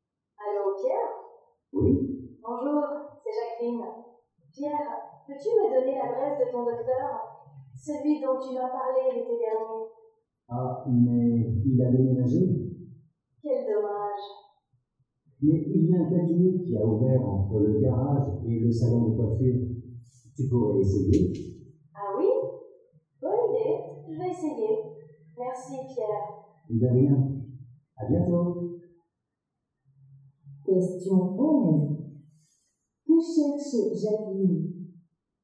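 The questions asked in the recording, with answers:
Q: Que cherche Jacqueline?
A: Un docteur (l'adresse d'un médecin)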